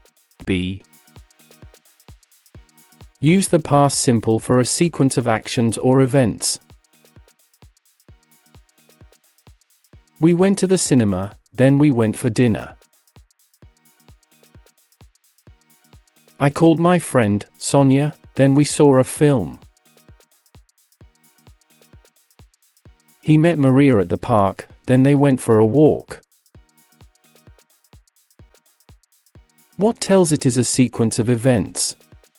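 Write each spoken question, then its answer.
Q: What tells it is a sequence of events?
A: the word "then"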